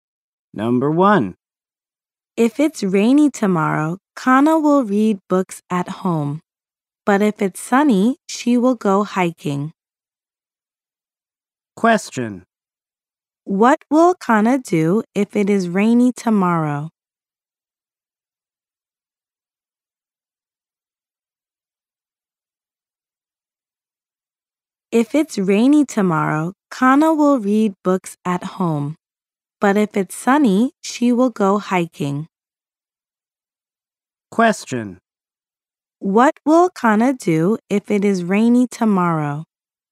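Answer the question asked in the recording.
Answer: She will read books at home.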